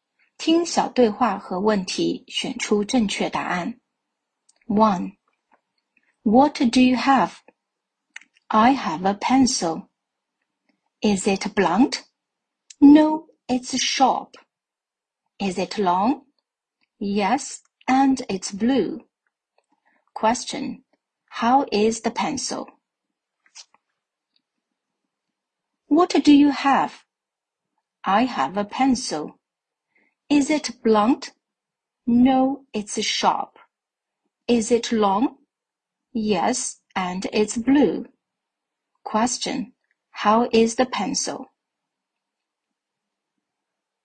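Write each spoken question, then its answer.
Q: How is the pencil?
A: It's sharp, long and blue.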